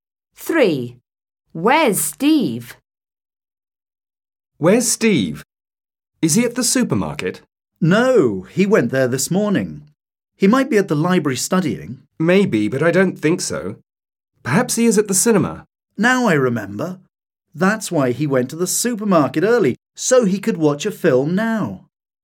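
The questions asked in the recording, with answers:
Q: Where's Steve?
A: At the cinema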